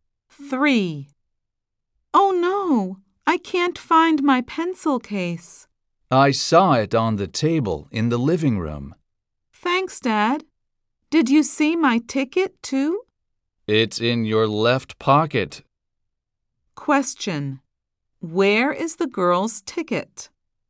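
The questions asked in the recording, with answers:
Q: Where is the girl's ticket?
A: In her left pocket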